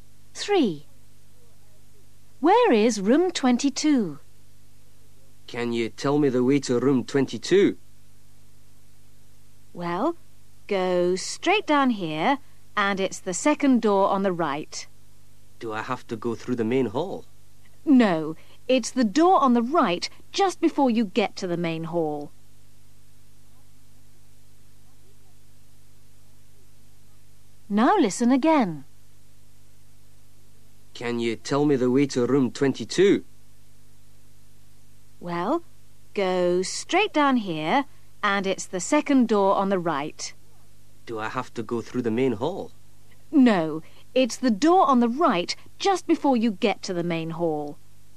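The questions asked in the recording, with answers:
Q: Where is room 22?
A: second door on the right, just before the main hall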